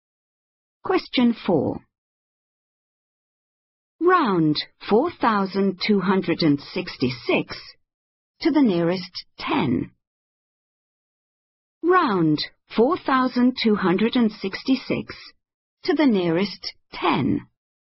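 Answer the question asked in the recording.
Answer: 4,270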